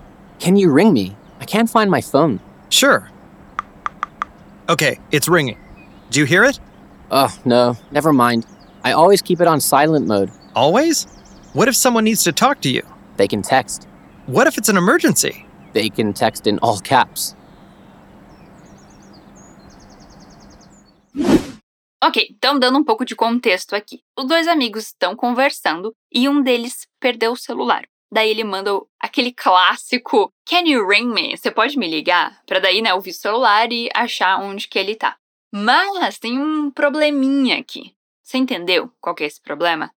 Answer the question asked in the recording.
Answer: Ah, não, deixa pra lá, eu sempre deixo no modo silencioso.